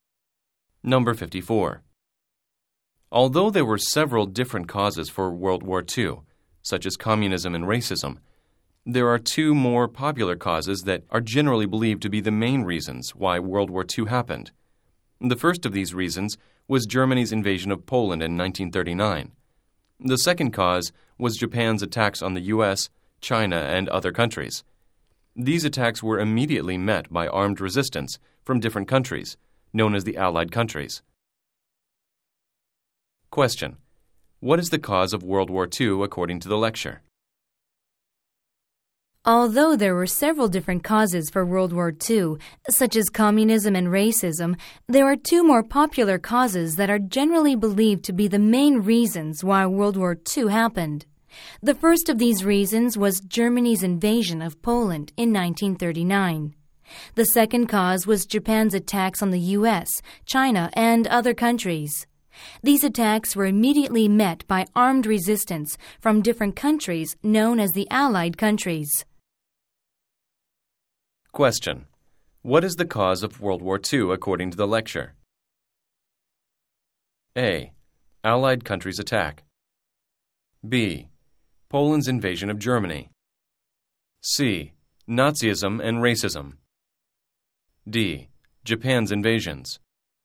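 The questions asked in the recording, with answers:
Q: What is the cause of World War II according to the lecture?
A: D: Japan's invasions.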